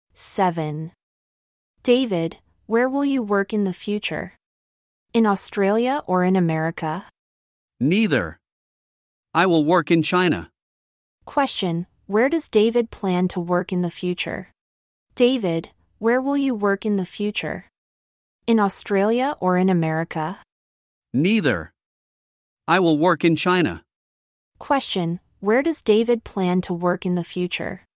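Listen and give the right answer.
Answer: In China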